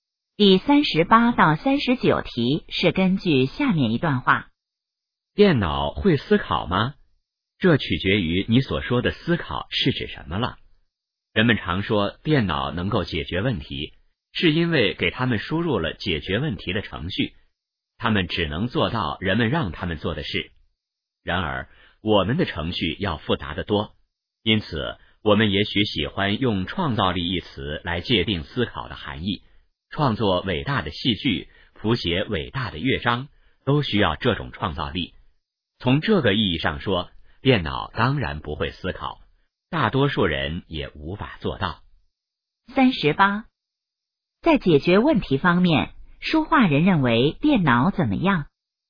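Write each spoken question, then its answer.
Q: 在解决问题方面,说话人认为电脑怎么样?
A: 只能做人们让它们做的事

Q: 这段话主要谈什么?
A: 电脑会不会思考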